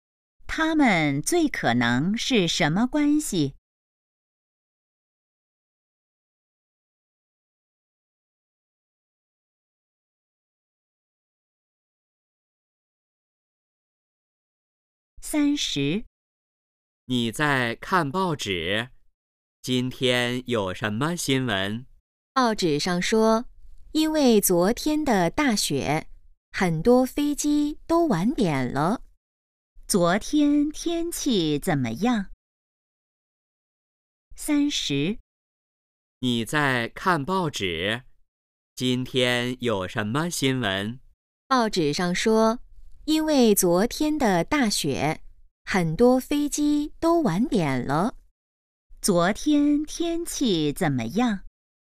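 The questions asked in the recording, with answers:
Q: 昨天天气怎么样?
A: 下大雪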